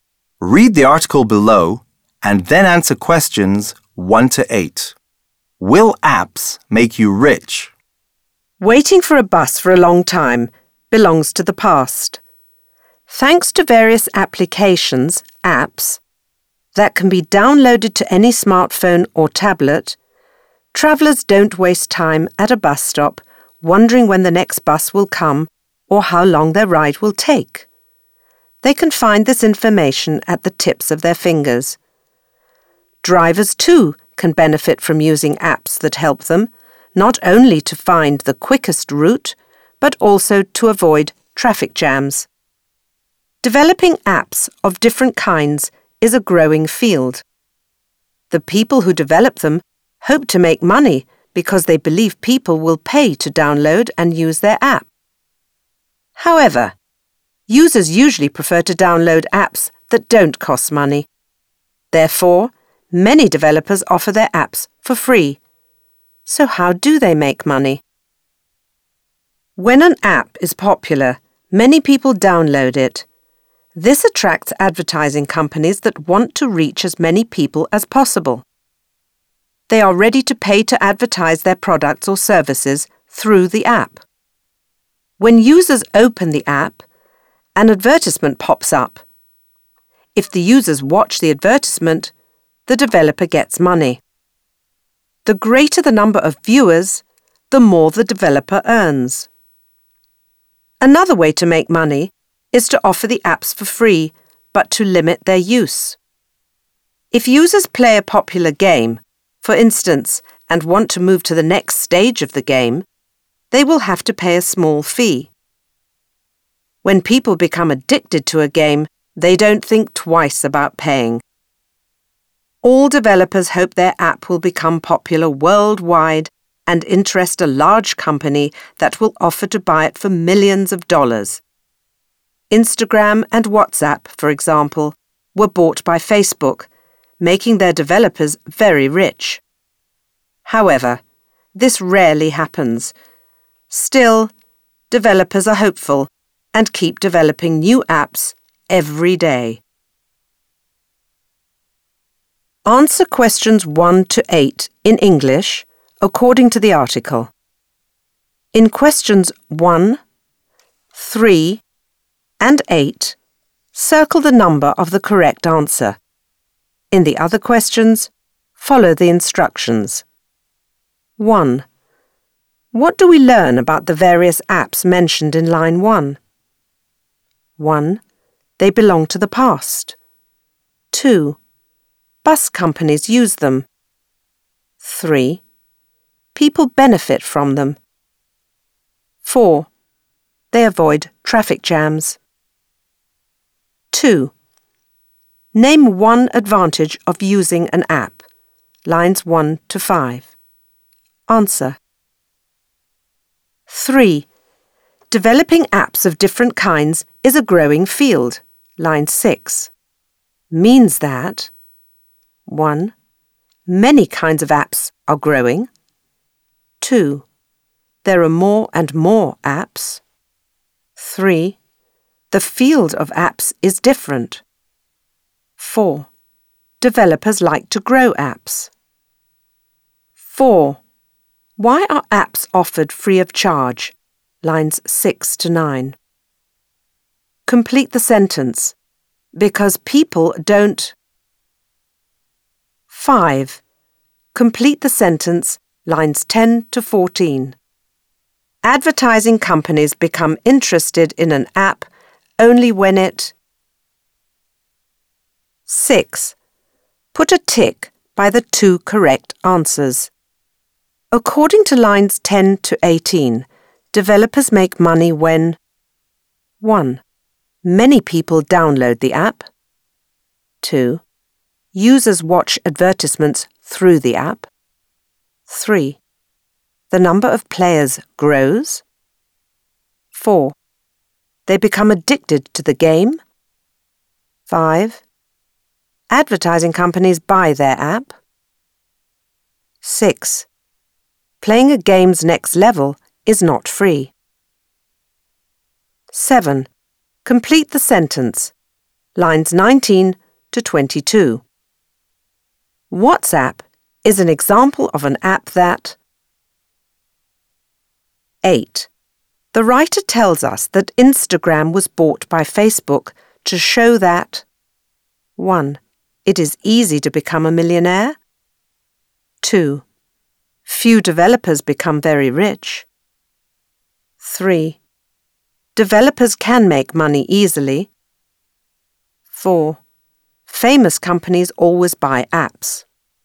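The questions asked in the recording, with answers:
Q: What do we learn about the various apps mentioned in line 1?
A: 3: People benefit from them.

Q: Name one advantage of using an app.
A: Travellers don't waste time waiting at a bus stop (or drivers can find the quickest route and avoid traffic jams).

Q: Developing apps of different kinds is a growing field.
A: 2: There are more and more apps.

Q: Why are apps offered free of charge?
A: Because people don't like to pay money to download apps.

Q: Advertising companies become interested in an app only when it...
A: is popular and many people download it.

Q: According to lines 10 to 18, developers make money when...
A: 2: Users watch advertisements through the app; 6: Playing a game's next level is not free.

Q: WhatsApp is an example of an app that...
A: was bought by a large company (Facebook) and made its developers very rich.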